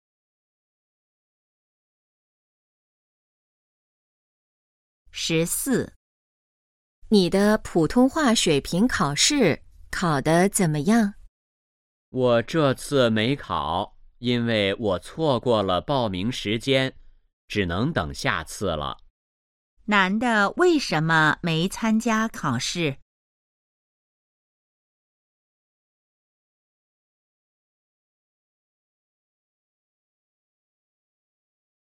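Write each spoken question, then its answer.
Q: 男的为什么没参加考试?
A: 错过了报名时间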